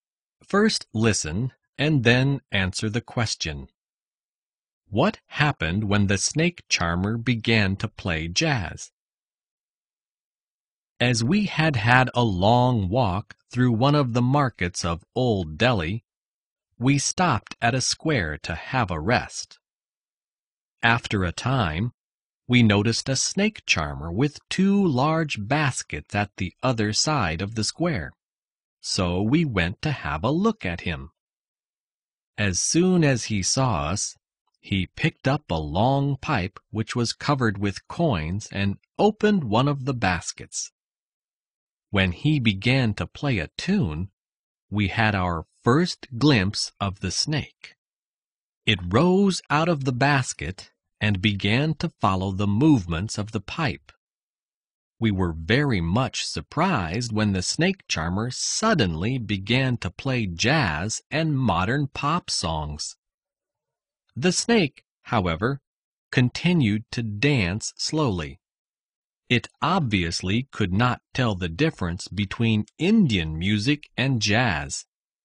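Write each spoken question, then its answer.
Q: What happened when the snake charmer began to play jazz?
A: The snake continued to dance slowly; it could not tell the difference between Indian music and jazz.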